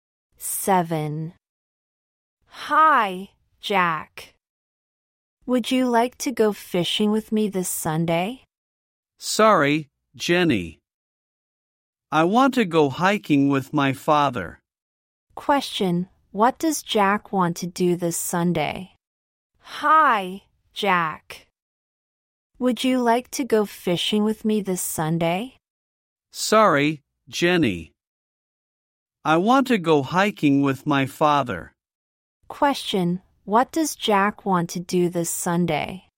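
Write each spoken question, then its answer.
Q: Question, what does Jack want to do this Sunday?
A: Go hiking with his father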